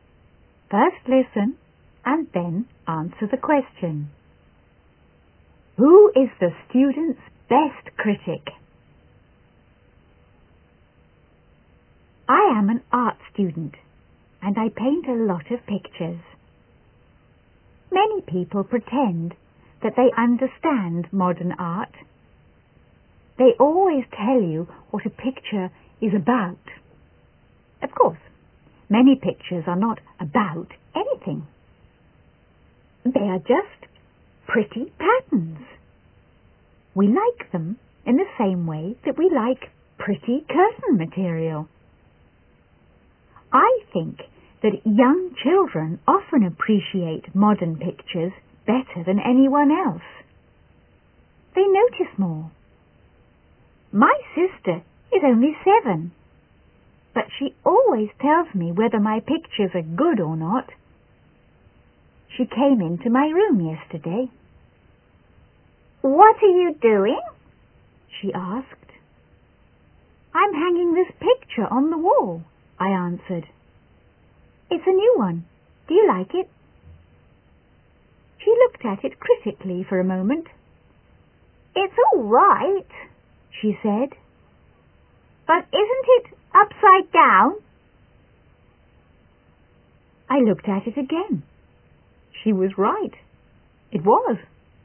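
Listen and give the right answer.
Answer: His 7-year-old sister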